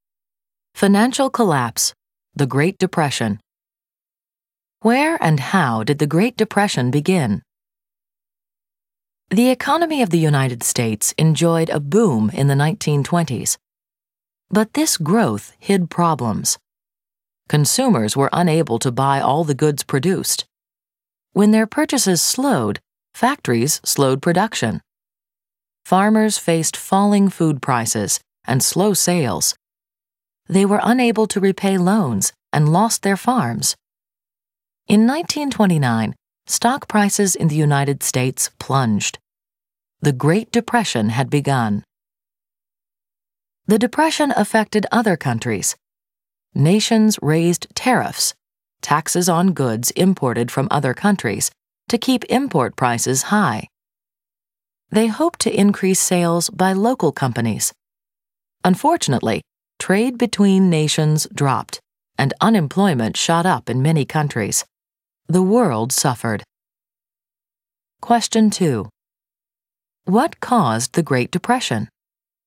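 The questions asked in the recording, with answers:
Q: What caused the Great Depression?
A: Hidden problems in the US economy: consumers couldn't buy all the goods made, farmers couldn't repay loans, and US stock prices crashed in 1929.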